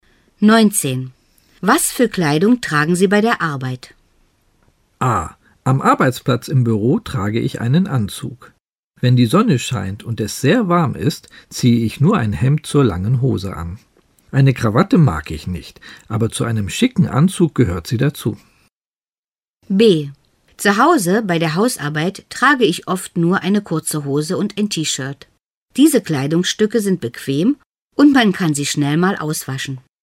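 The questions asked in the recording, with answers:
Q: Was für Kleidung tragen Sie bei der Arbeit?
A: A: Am Arbeitsplatz im Büro trage ich einen Anzug.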